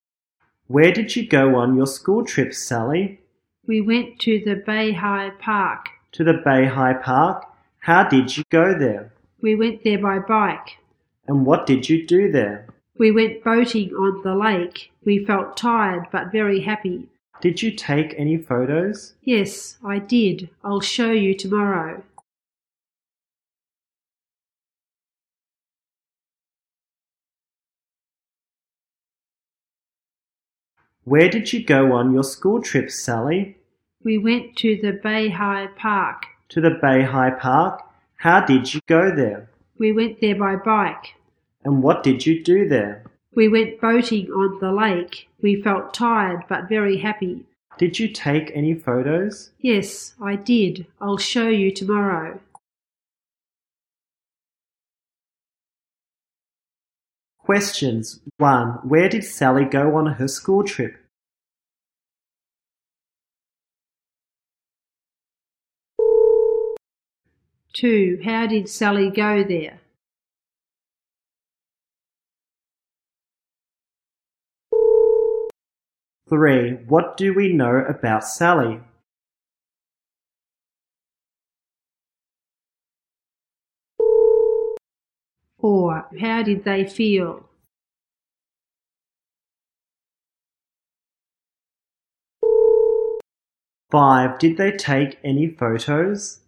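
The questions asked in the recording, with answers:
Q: Where did Sally go on her school trip?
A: To the Beihai Park

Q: How did Sally go there?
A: By bike

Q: How did they feel?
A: Tired but very happy

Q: Did they take any photos?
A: Yes, they did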